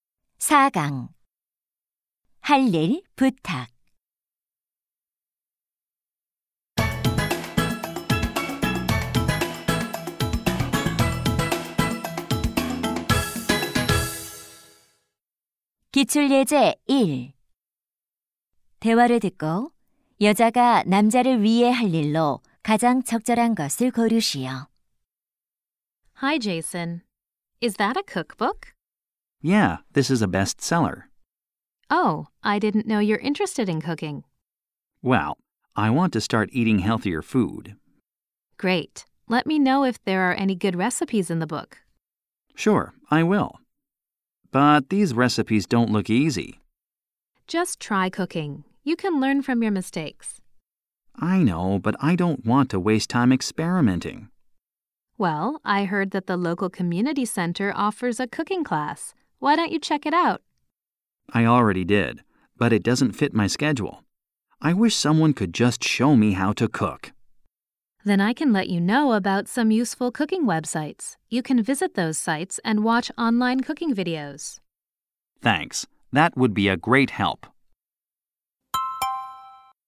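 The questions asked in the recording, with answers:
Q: 대화를 듣고 여자가 남자를 위해 할 일로 가장 적절한 것을 고르시오.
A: 유용한 요리 웹사이트 알려주기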